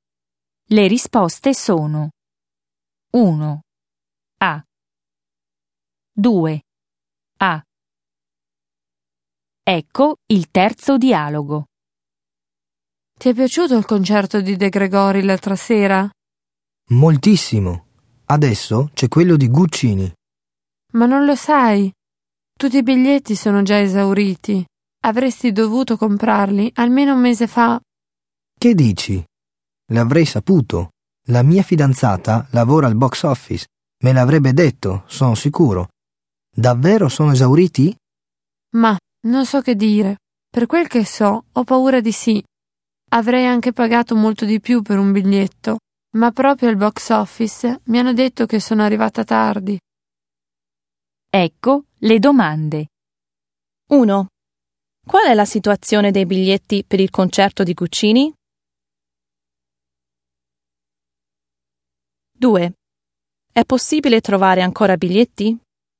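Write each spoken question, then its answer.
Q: È possibile trovare ancora biglietti?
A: No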